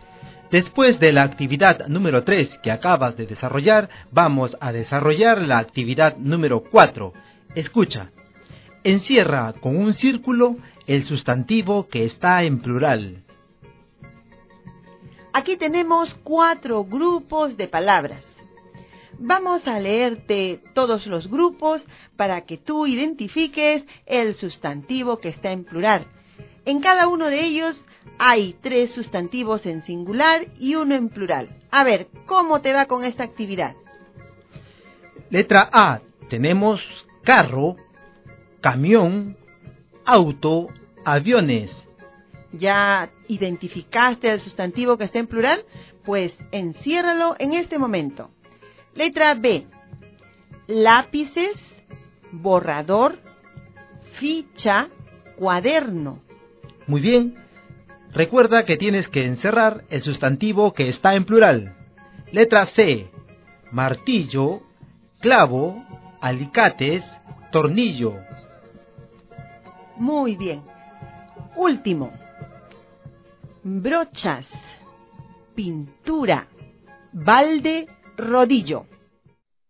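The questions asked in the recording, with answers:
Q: Letra A. Tenemos carro, camión, auto, aviones.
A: aviones

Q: Letra B. Lápices, borrador, ficha, cuaderno.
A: lápices

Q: Letra C. Martillo, clavo, alicates, tornillo.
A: alicates

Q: Último. Brochas, pintura, balde, rodillo.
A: brochas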